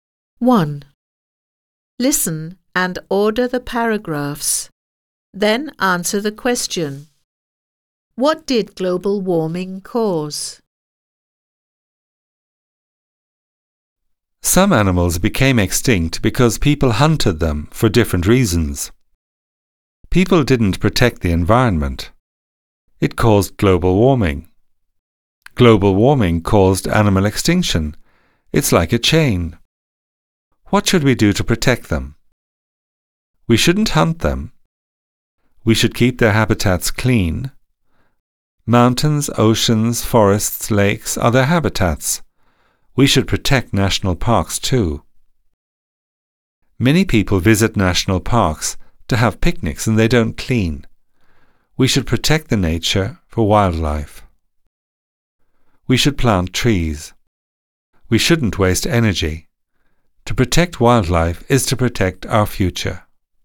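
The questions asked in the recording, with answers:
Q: What did global warming cause?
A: Animal extinction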